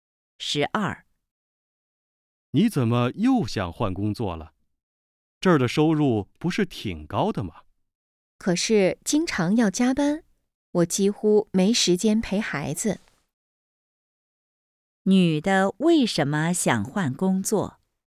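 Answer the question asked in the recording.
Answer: 经常加班,没时间陪孩子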